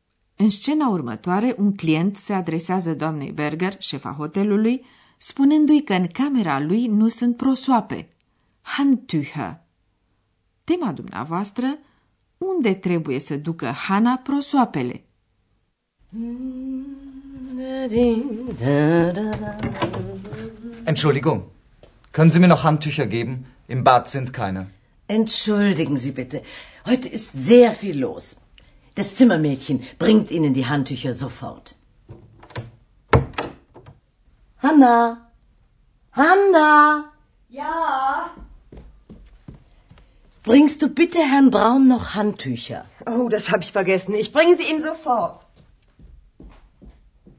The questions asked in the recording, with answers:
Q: unde trebuie să ducă Hana prosoapele?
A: Camerista trebuie să ducă numai decât prosoape domnului Brown, deoarece a uitat să pună prosoape curate în camera sa de baie.